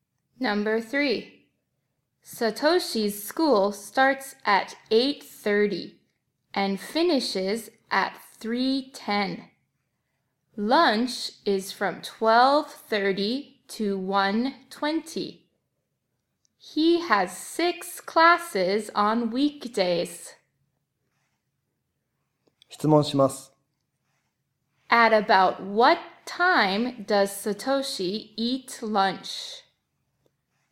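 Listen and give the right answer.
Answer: At about 12:30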